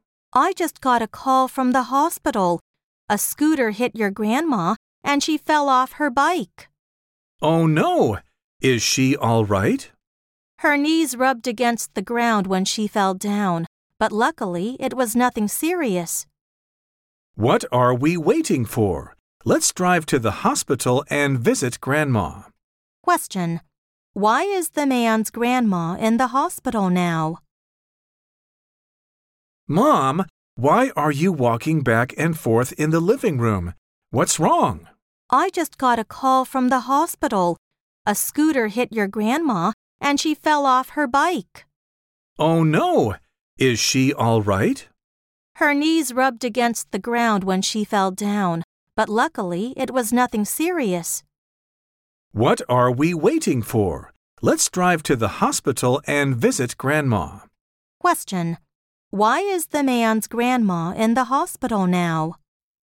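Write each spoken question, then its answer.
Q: Why is the man's grandma in the hospital now?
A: A scooter hit her, and she fell off her bike.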